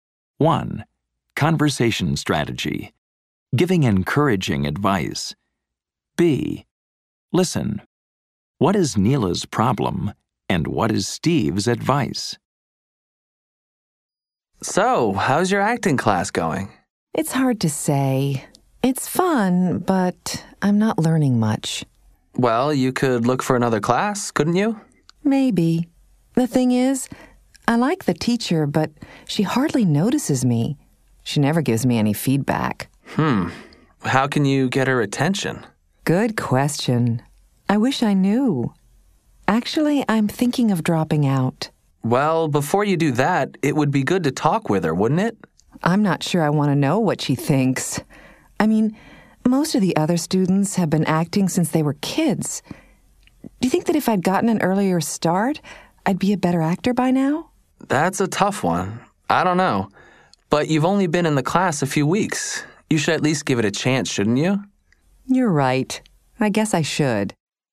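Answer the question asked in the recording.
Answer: Her acting teacher hardly notices her or gives feedback and she's thinking of dropping out; Steve advises her to talk with the teacher and give the class a chance.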